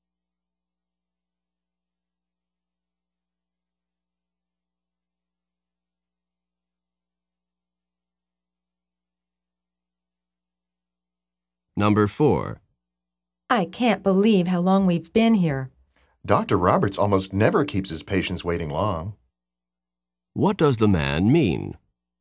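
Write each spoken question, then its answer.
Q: What does the man mean?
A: The long wait is unusual for Dr. Roberts.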